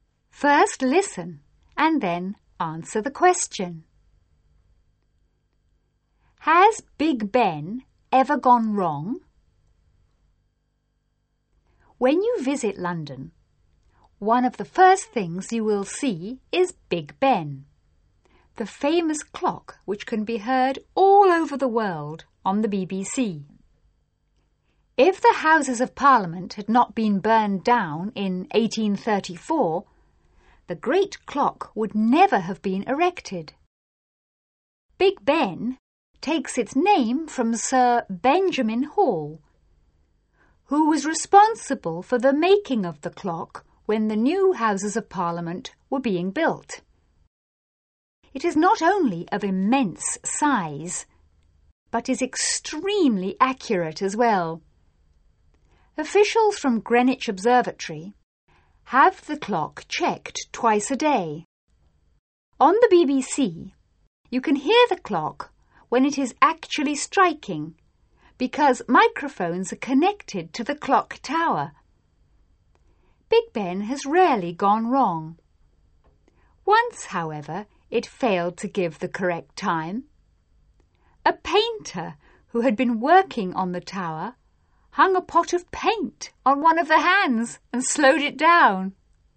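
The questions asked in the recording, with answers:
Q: Has Big Ben ever gone wrong?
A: Yes, once, when a painter hung a pot of paint on one of the hands and slowed it down.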